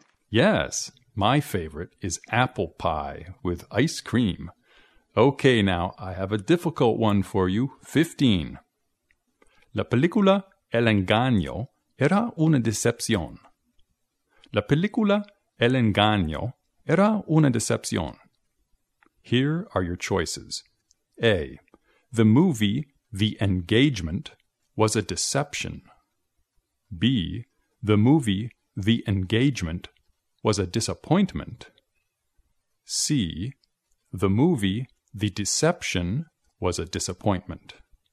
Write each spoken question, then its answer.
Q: La película El Engaño era una decepción.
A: La respuesta es C. The movie The Deception was a disappointment.